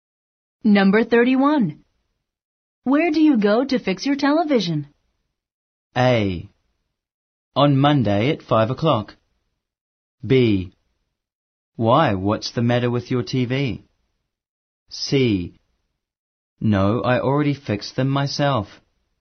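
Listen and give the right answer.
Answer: B: Why, what's the matter with your TV?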